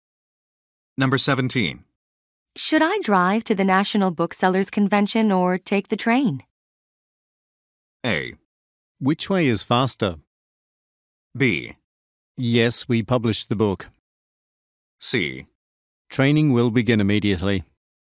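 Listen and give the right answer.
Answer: A: Which way is faster?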